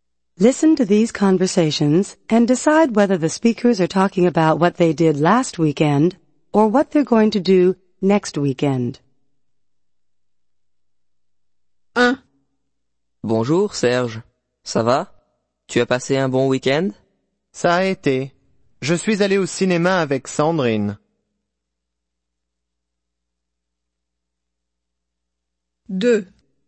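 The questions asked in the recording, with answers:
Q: Listen to these conversations and decide whether the speakers are talking about what they did last weekend or what they're going to do next weekend.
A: last weekend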